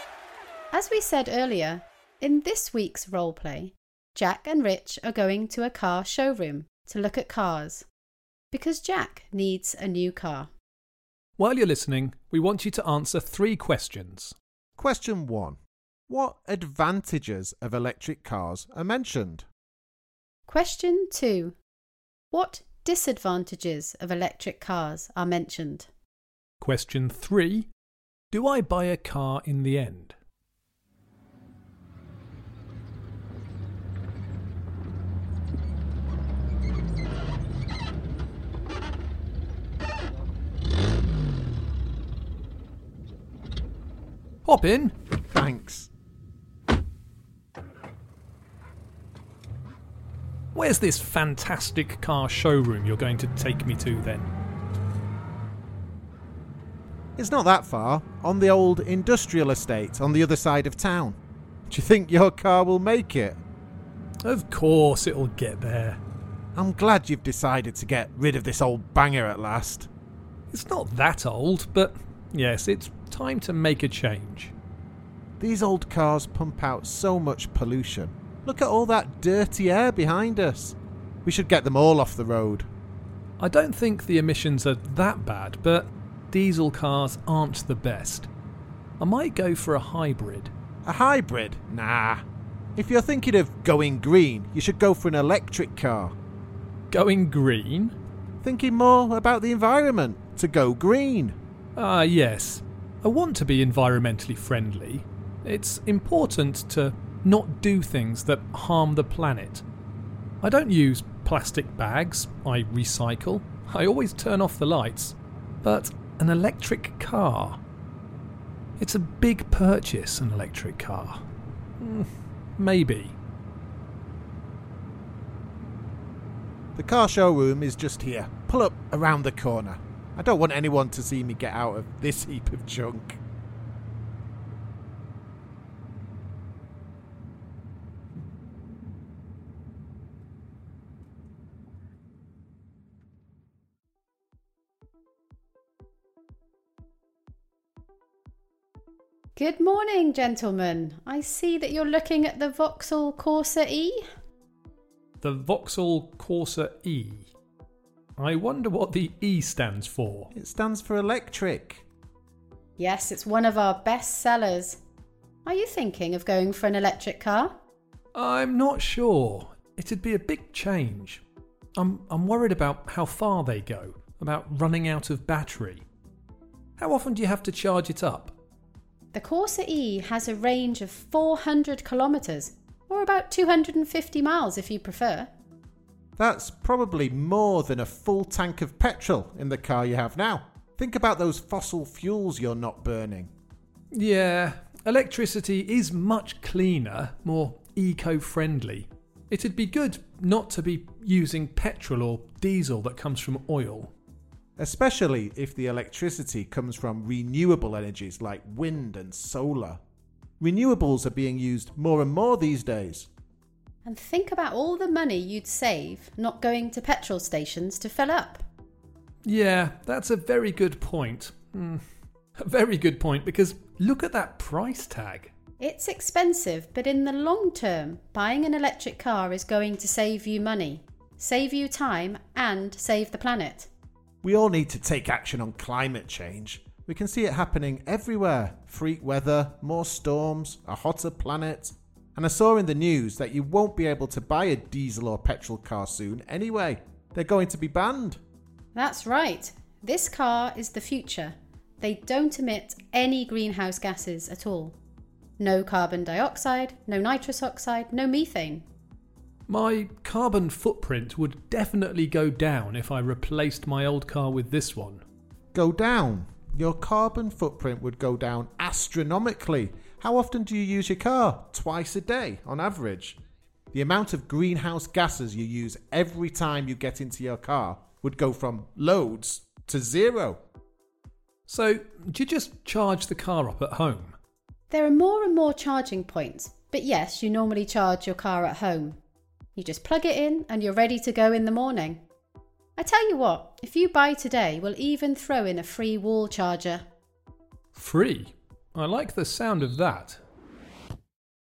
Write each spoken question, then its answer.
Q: what advantages of electric cars are mentioned?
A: The main advantage was that electric cars are much better for our planet than traditional cars that emit more pollution.

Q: what disadvantages of electric cars are mentioned?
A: Well, Jack had a few worries, but the main disadvantage was the price tag.